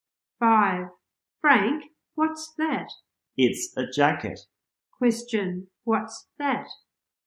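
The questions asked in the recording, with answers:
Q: Question, what's that?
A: A jacket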